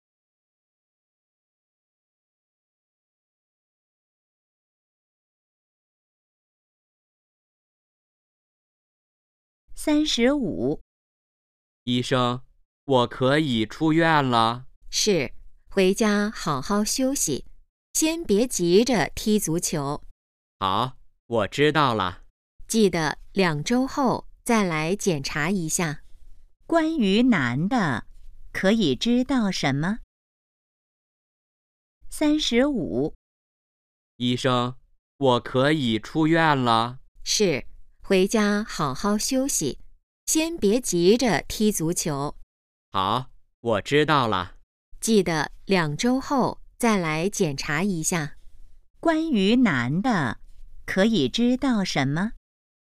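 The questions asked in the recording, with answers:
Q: 关于男的,可以知道什么?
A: 他可以出院了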